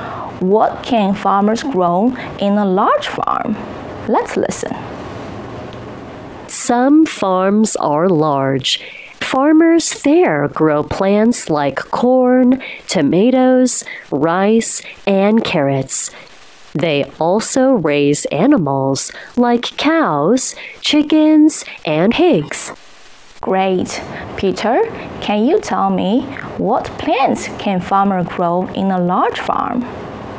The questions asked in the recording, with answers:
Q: Peter, can you tell me what plants can farmers grow in a large farm?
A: They can grow plants like corn, tomatoes, rice, and carrots.